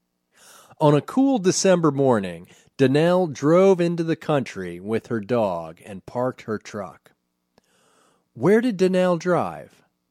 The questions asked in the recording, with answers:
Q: Where did Danielle drive?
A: She drove into the country.